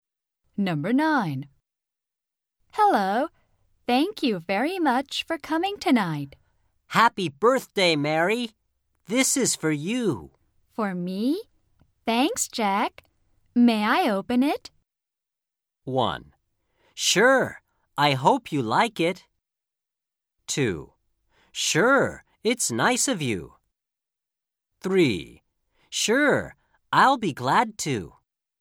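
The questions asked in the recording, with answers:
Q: For me? Thanks, Jack. May I open it?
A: 1: Sure. I hope you like it.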